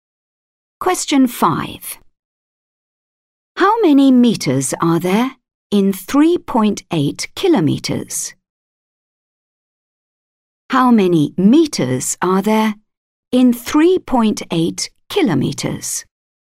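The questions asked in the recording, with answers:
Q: How many meters are there in 3.8 kilometers?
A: 3800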